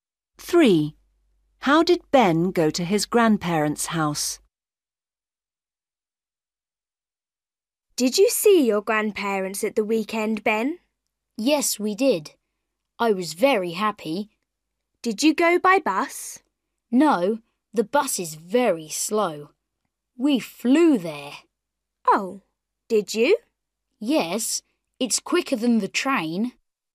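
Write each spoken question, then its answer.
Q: How did Ben go to his grandparents' house?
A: by plane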